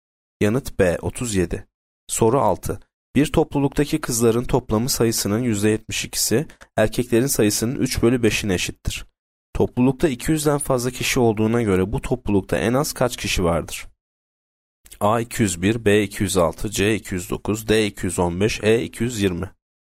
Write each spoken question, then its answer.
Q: Toplulukta 200'den fazla kişi olduğuna göre bu toplulukta en az kaç kişi vardır?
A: Yanıt C 209.